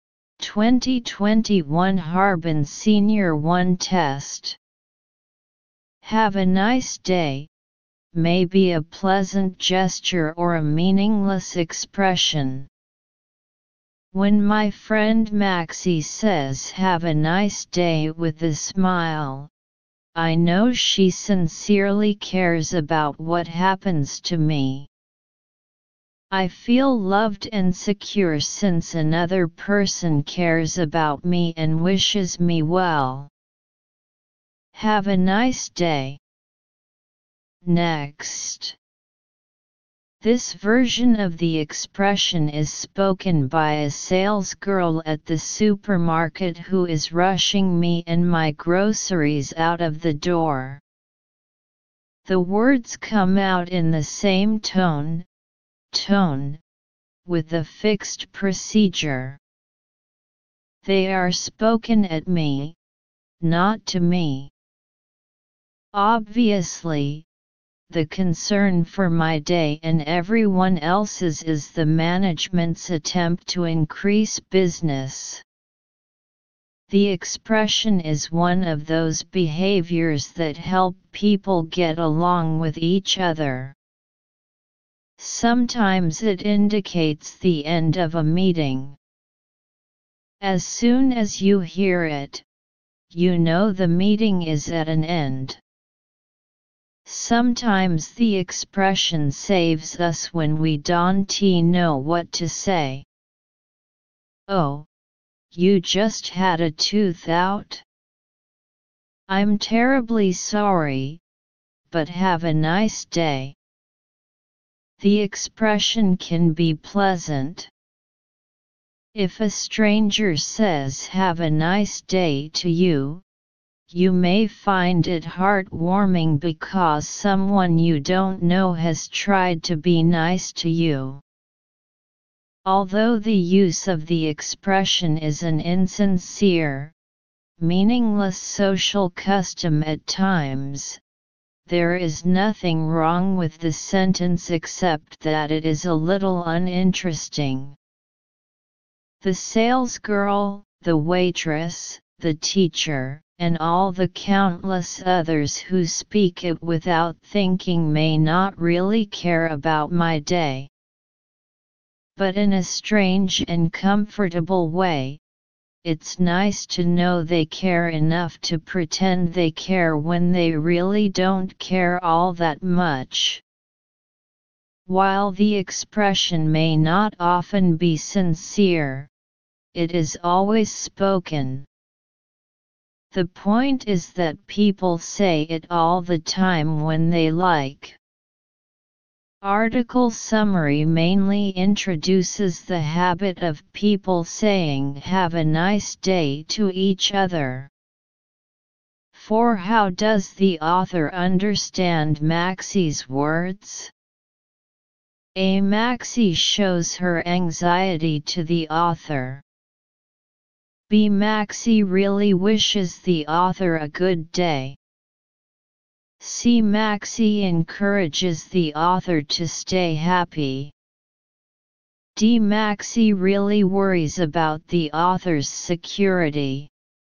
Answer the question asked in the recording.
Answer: Analysis: choose B.